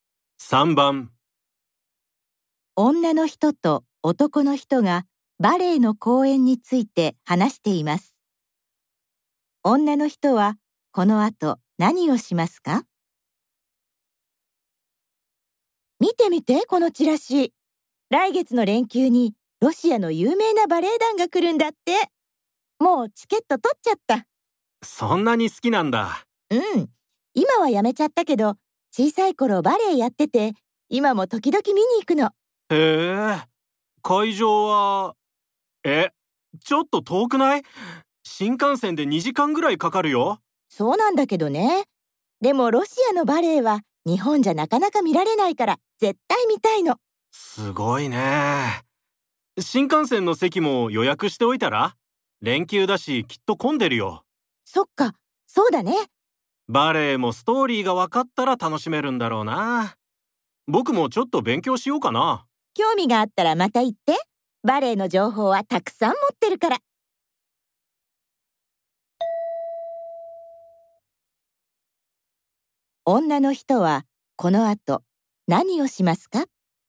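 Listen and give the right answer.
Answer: 新幹線の席を予約する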